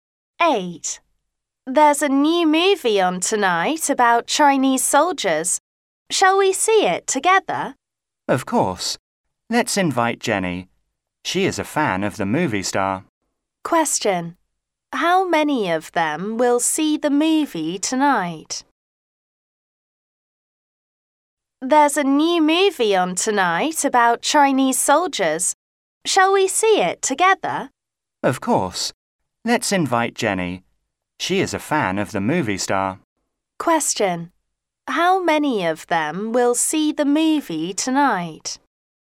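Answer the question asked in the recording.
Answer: Three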